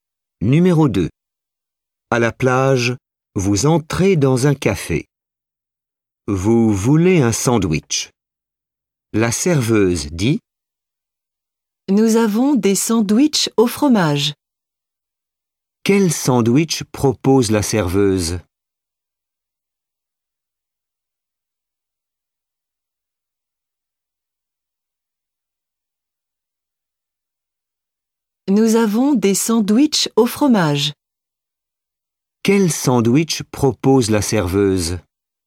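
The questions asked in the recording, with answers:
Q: Quel sandwich propose la serveuse?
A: Des sandwichs au fromage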